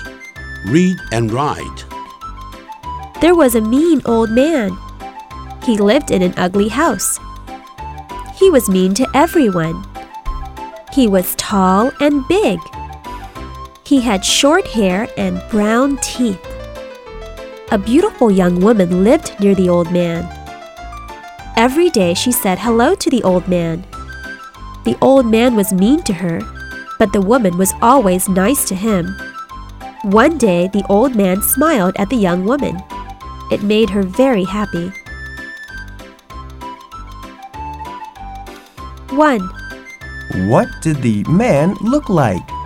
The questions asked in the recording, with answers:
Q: What did the man look like?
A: He was tall and big. He has short hair and brown teeth.